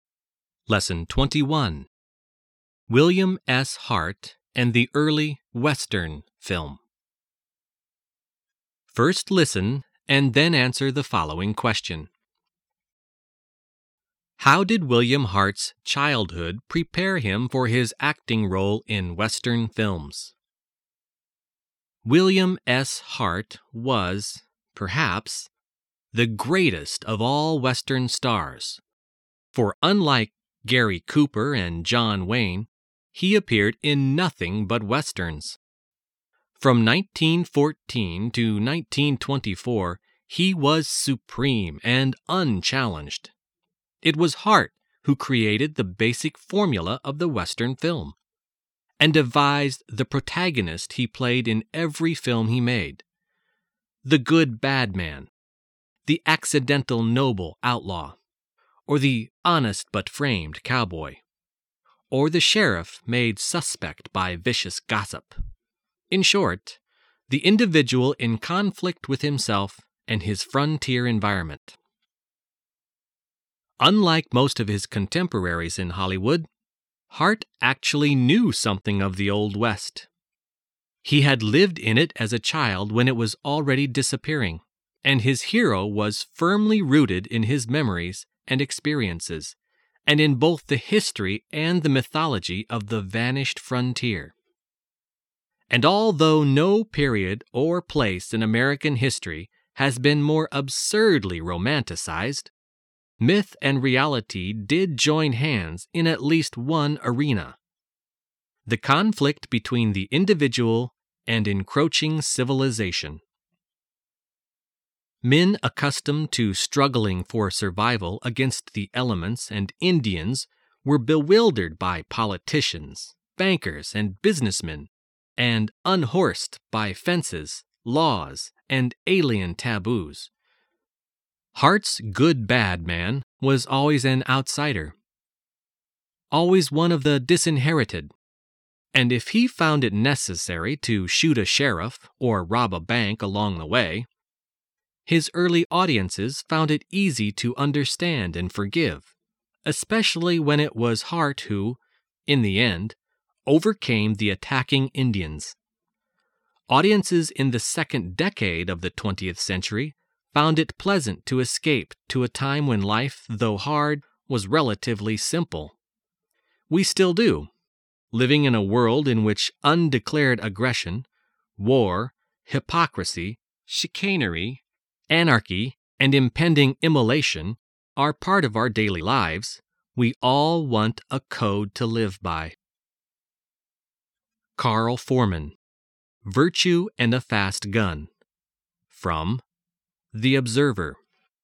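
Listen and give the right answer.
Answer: He lived in the Old West as a child, so his hero was rooted in his own memories and experiences of the vanishing frontier.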